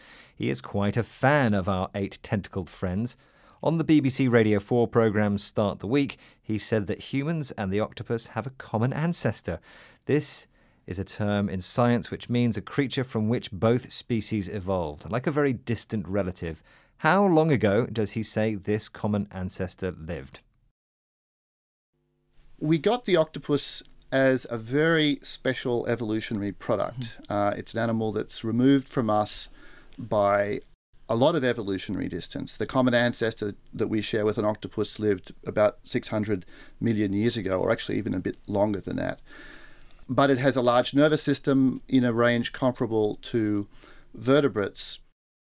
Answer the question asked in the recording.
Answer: So our common ancestor lived about 600 million years ago, or maybe a little bit longer than that.